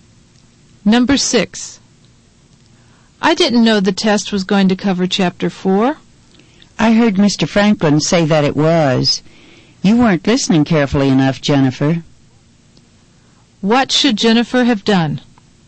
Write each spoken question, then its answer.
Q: What should Jennifer have done?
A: She ought to have listened more carefully to Mr.